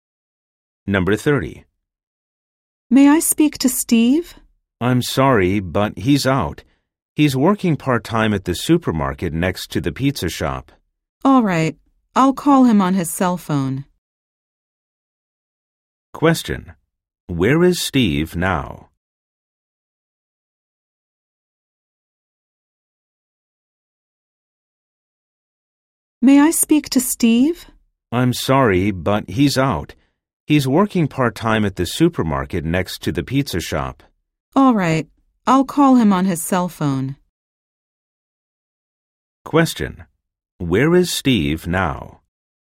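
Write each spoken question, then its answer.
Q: Where is Steve now?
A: At the supermarket next to the pizza shop, working part-time.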